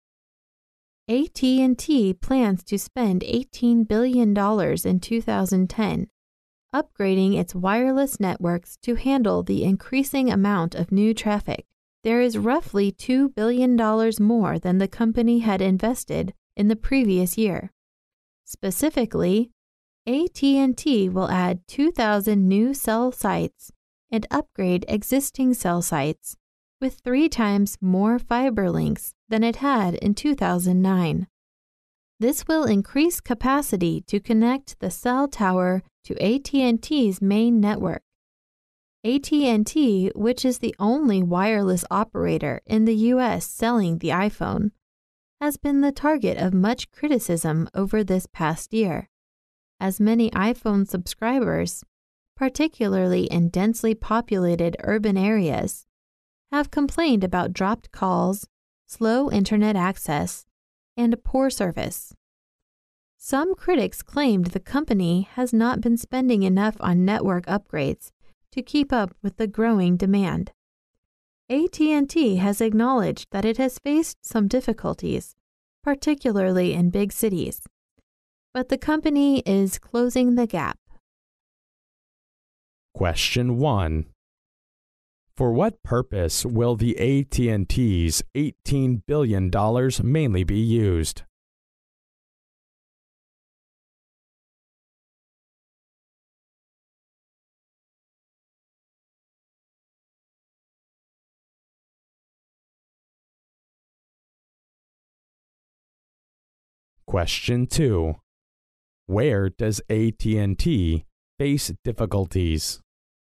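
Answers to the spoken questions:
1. To upgrade its wireless networks to handle increasing traffic
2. In big cities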